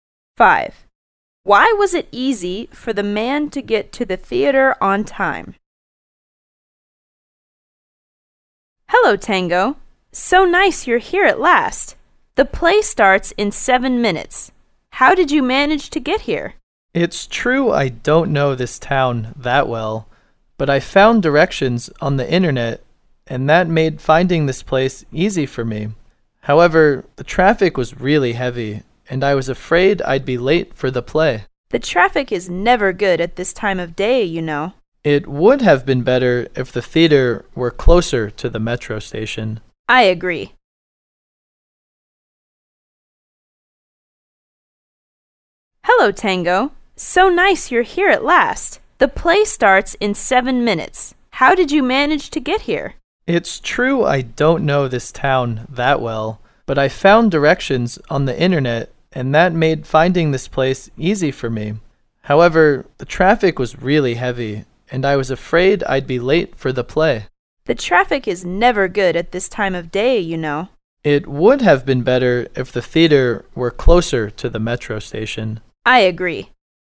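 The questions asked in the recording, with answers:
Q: Why was it easy for the man to get to the theater on time?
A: He found directions on the internet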